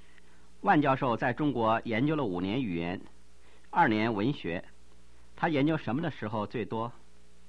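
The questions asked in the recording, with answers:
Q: 他研究什么的时候最多?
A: 语言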